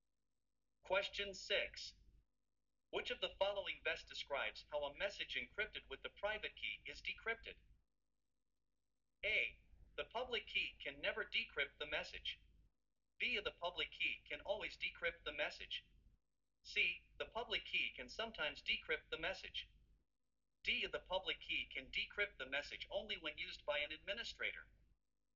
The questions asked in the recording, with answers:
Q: Which of the following best describes how a message encrypted with the private key is decrypted?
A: The correct answer is B.